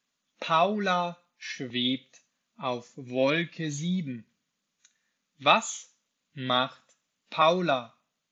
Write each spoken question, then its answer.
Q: Was macht Paula?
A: Sie schwebt. Sie schwebt auf Wolke 7.